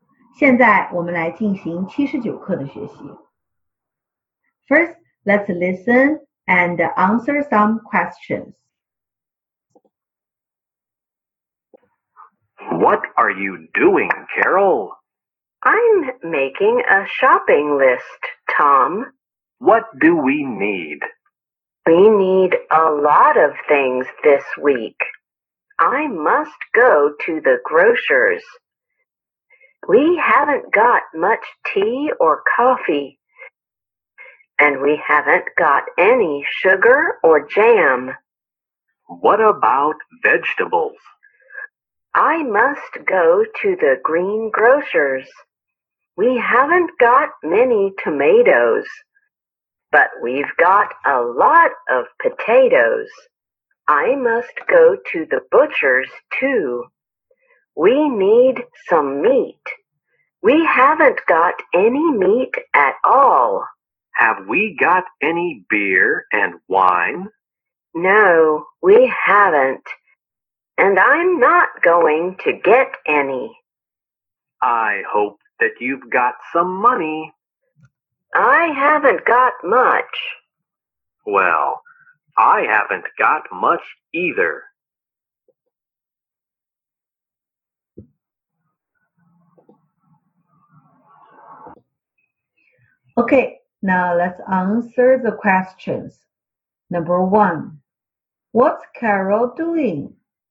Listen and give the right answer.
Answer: She's making a shopping list.